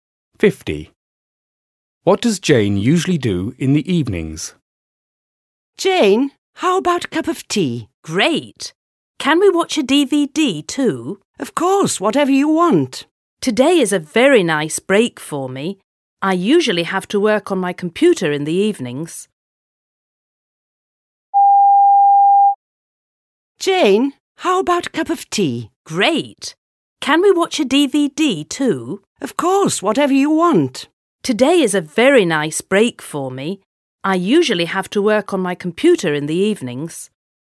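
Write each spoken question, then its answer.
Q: What does Jane usually do in the evenings?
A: Works on her computer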